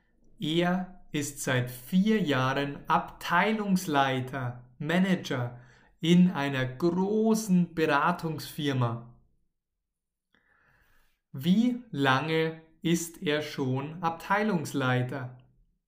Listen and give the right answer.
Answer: Seit vier Jahren.